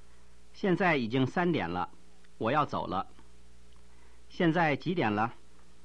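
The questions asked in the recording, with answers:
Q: 现在几点了?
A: 三点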